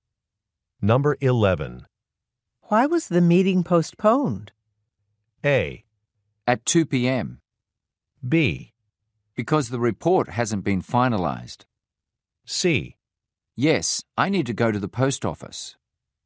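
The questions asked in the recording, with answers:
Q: Why was the meeting postponed?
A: B: Because the report hasn't been finalized.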